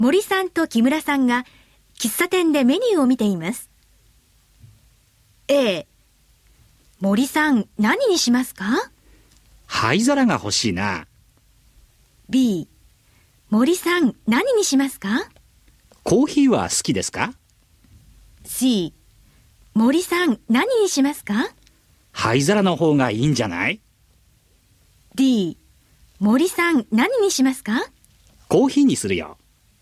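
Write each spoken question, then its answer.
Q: 森さん何にしますか?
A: D: コーヒーにするよ。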